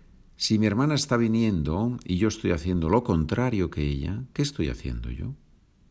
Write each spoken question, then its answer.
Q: Si mi hermana está viniendo y yo estoy haciendo lo contrario que ella, ¿qué estoy haciendo yo?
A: Estoy yendo.